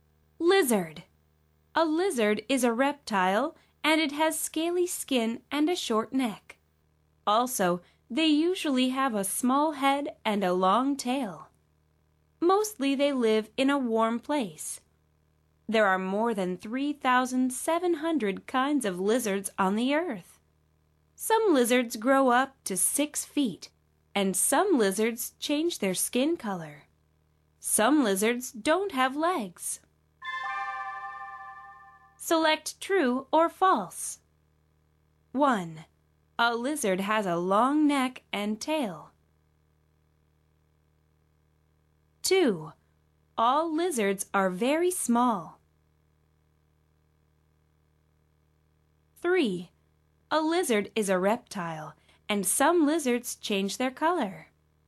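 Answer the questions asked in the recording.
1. False
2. False
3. True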